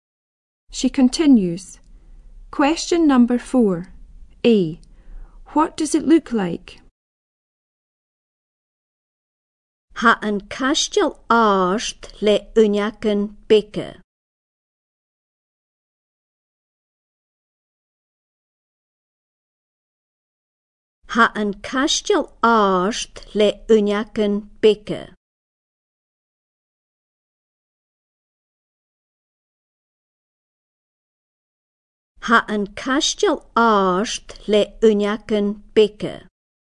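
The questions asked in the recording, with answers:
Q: A. What does it look like?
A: Tall with small windows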